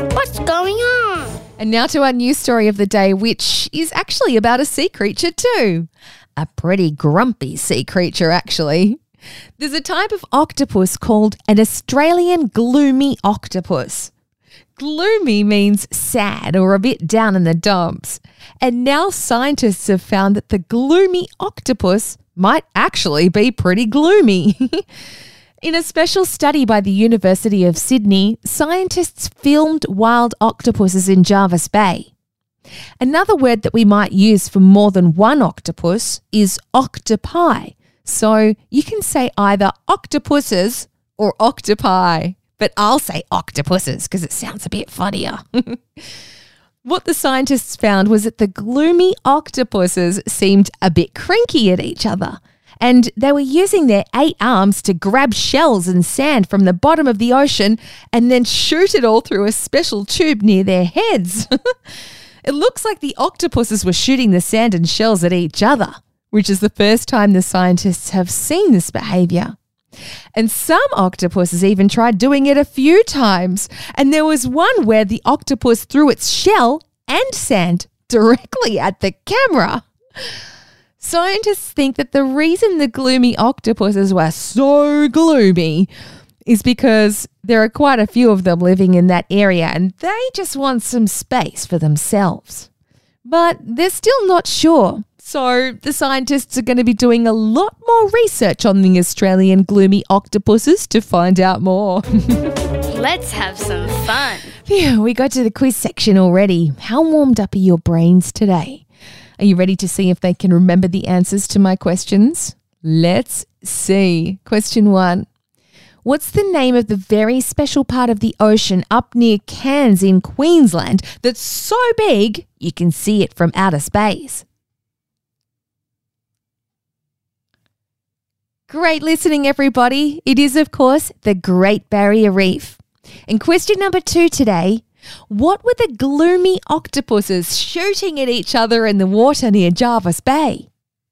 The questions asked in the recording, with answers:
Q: what were the gloomy octopuses shooting at each other in the water near Jervis Bay?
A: You're right. It was sand and shells.